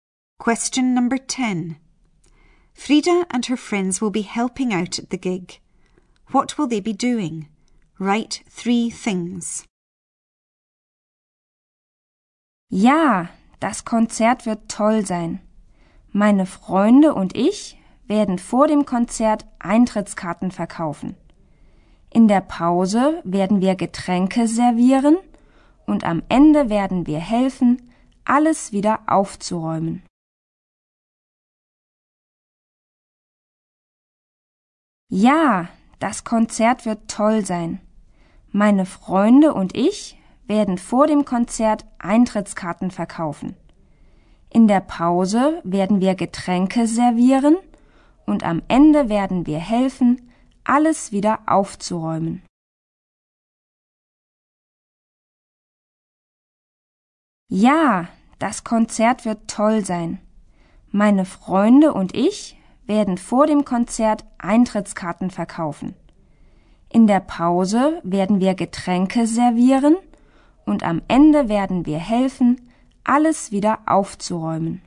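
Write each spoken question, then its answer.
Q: What will they be doing? Write three things.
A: Selling tickets before the concert; serving drinks in the interval; helping to tidy up at the end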